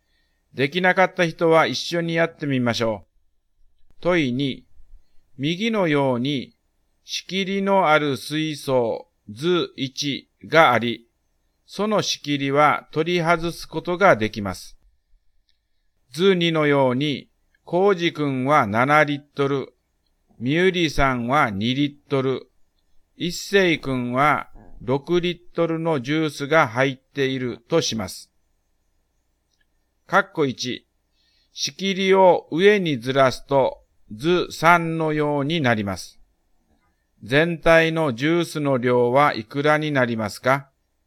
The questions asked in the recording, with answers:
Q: 全体のジュースの量はいくらになりますか?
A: 全体の量は15リットルになりますね